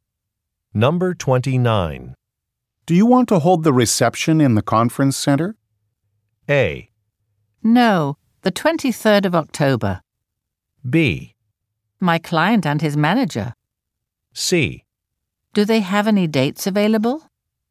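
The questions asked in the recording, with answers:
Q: Do you want to hold the reception in the conference center?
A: C: Do they have any dates available?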